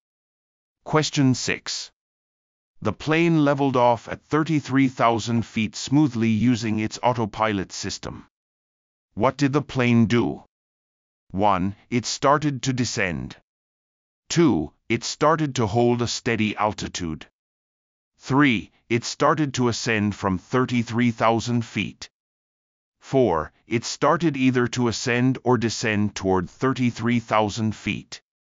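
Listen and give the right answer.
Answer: 2: It started to hold a steady altitude.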